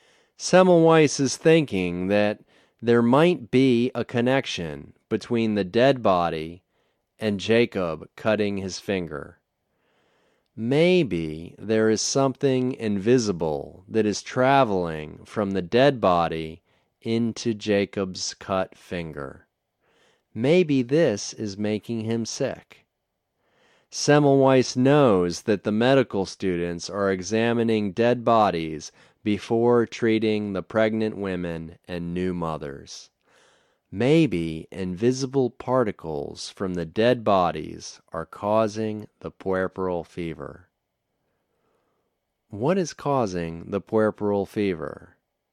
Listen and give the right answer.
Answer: The invisible particles are maybe causing the puerperal fever.